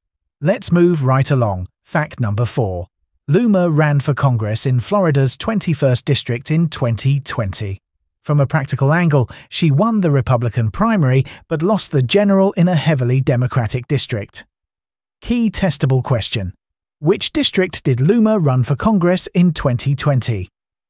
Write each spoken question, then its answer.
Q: Which district did Loomer run for Congress in 2020?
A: Correct answer. Florida's 21st district.